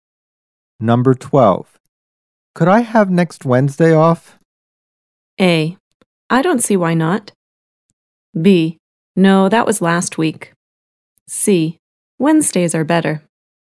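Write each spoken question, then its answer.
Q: Could I have next Wednesday off?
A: A: I don't see why not.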